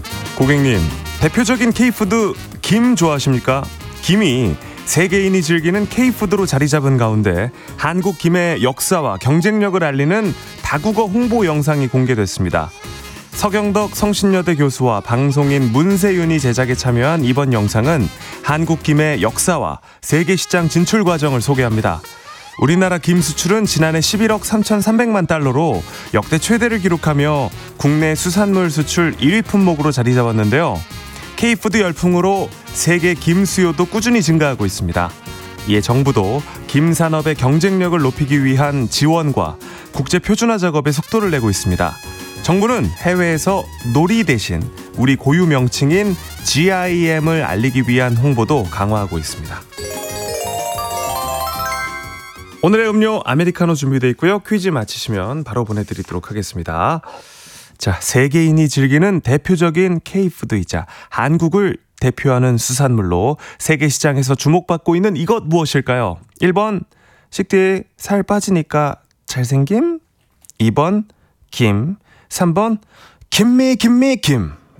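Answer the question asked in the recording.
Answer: 2: 김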